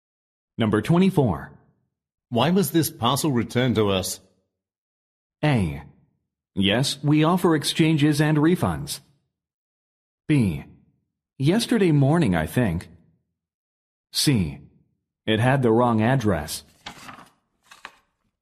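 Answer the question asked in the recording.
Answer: C: It had the wrong address.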